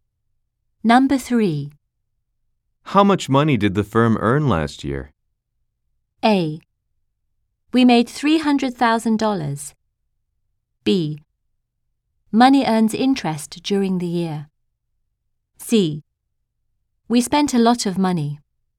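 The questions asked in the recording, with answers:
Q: How much money did the firm earn last year?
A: A: We made $300,000.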